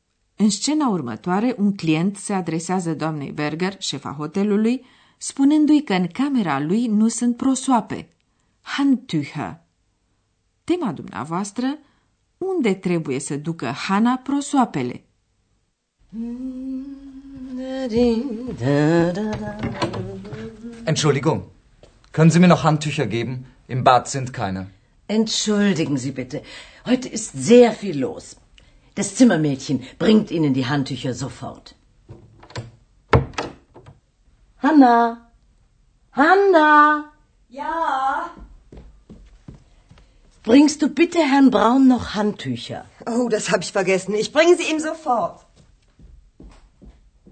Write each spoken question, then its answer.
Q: unde trebuie să ducă Hana prosoapele?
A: Camerista trebuie să ducă numai decât prosoape domnului Brown, deoarece a uitat să pună prosoape curate în camera sa de baie.